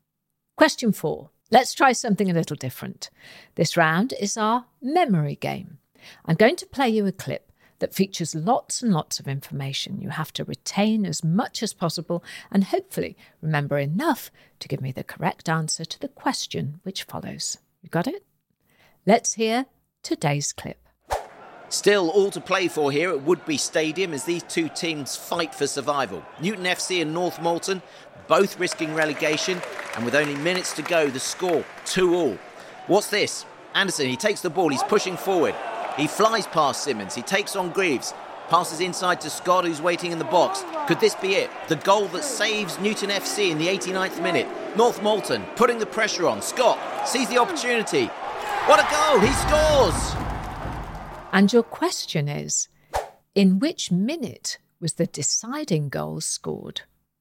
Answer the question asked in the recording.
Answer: And the answer was the 89th minute.